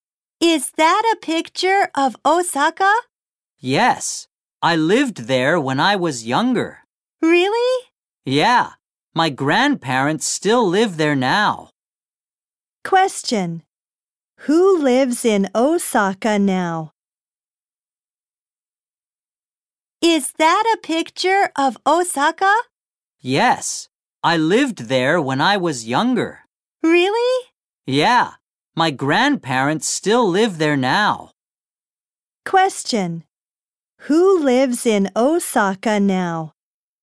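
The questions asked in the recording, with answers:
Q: Question: Who lives in Osaka now?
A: The speaker's grandparents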